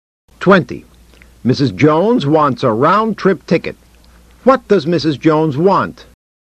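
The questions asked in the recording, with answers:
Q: What does Mrs. Jones want?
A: A round-trip ticket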